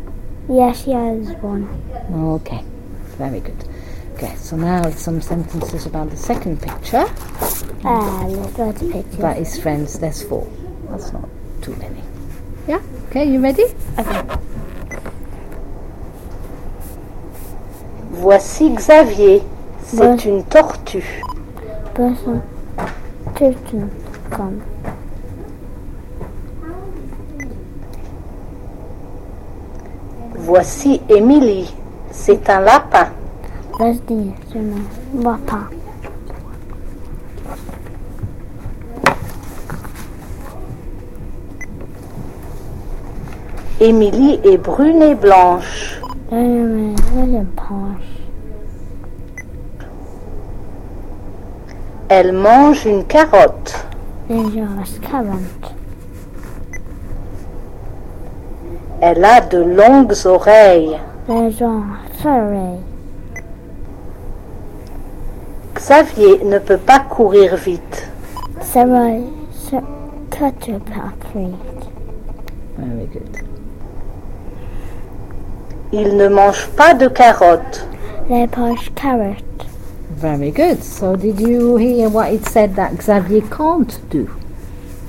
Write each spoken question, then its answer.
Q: So did you hear what it said that Xavier can't do?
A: Run.